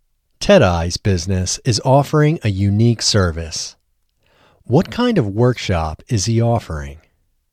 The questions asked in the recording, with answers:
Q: What kind of workshop is he offering?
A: He is offering corporate crying workshops.